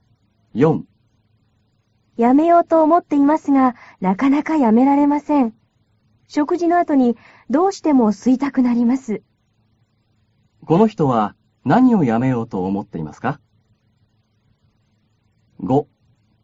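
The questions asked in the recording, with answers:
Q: この人は何をやめようと思っていますか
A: たばこ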